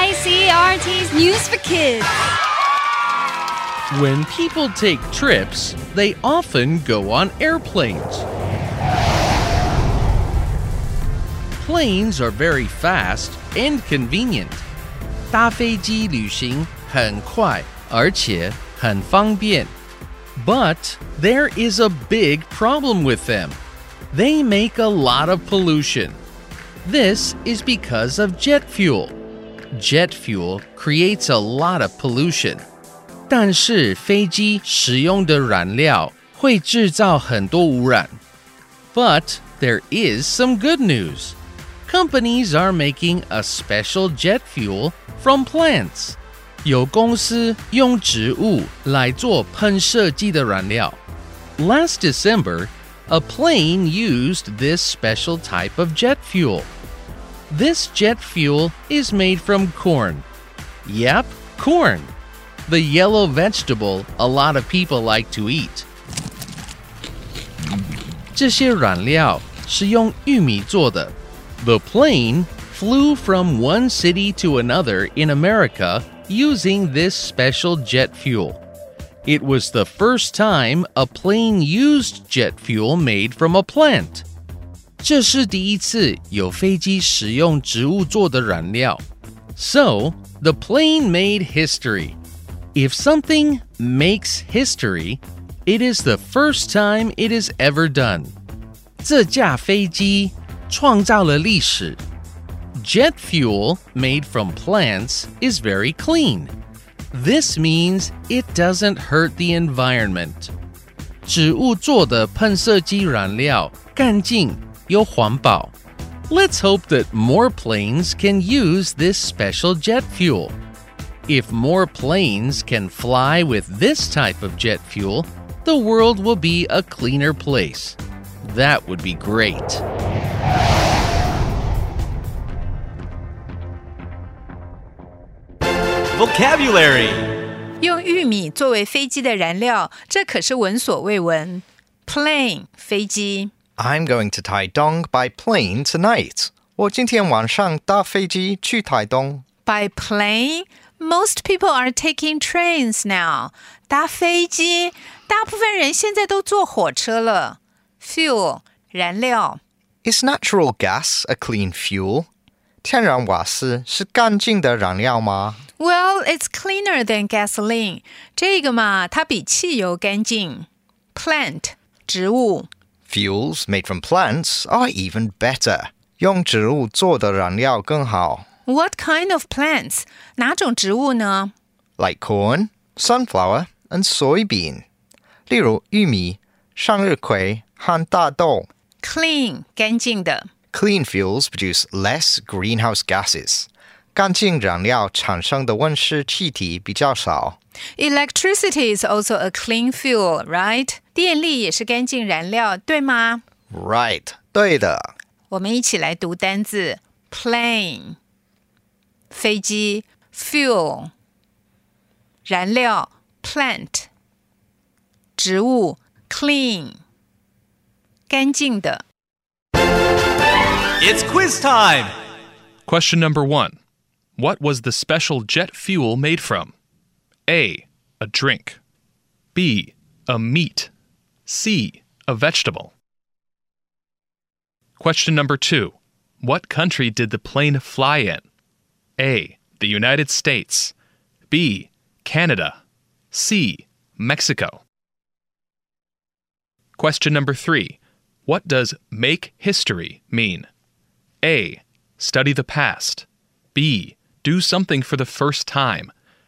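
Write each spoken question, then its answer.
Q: What was the special jet fuel made from?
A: C: A vegetable

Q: What country did the plane fly in?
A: A: The United States

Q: What does make history mean?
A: B: Do something for the first time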